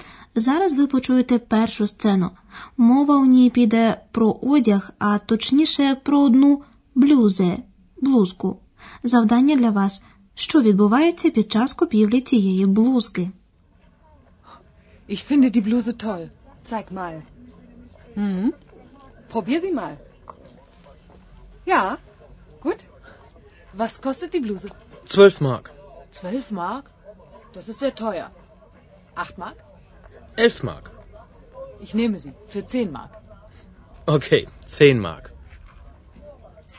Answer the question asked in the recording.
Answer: Покупці намагаються якомога більше знизити ціну.